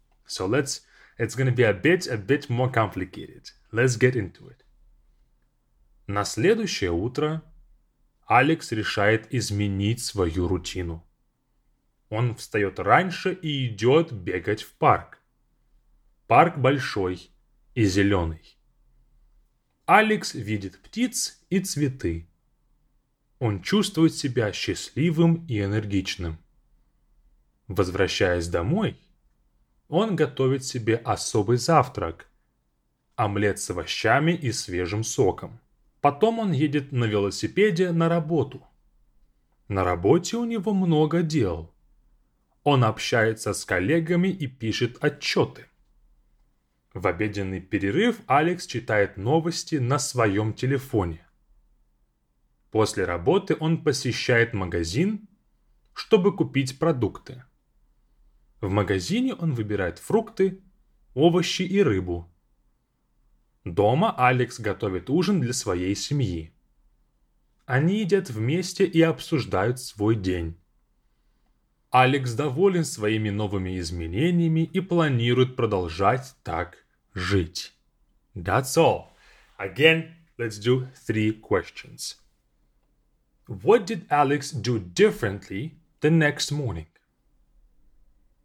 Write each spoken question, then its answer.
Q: What did Alex do differently the next morning?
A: Alex decides to change his routine and gets up early to go run in a park.